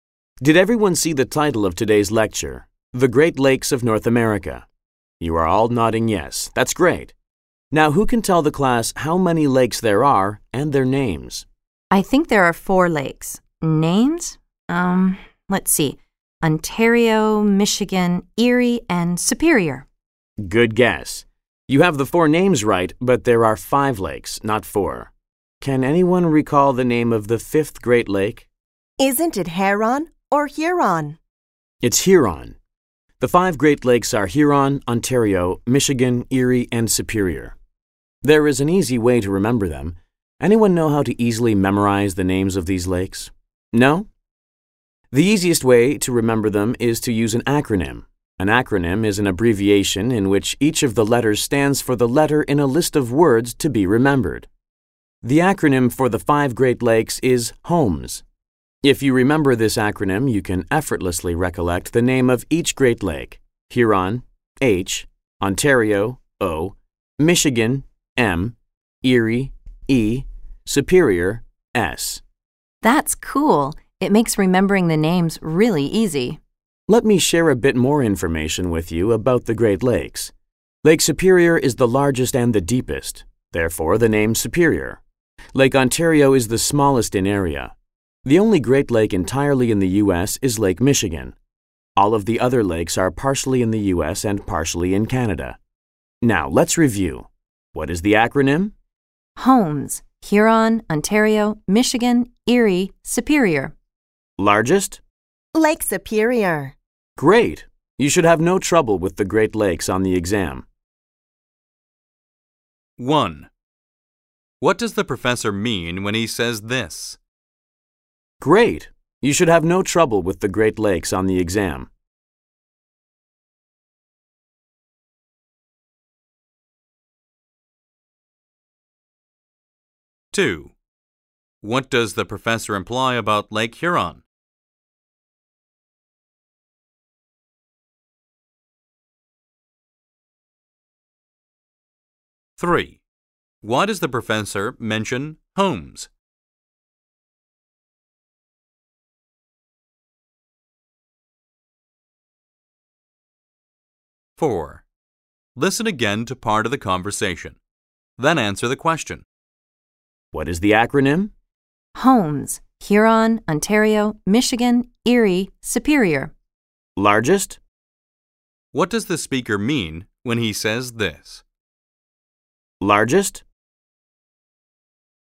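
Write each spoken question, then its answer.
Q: Why does the professor mention homes?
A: As an acronym to help remember the names of the five Great Lakes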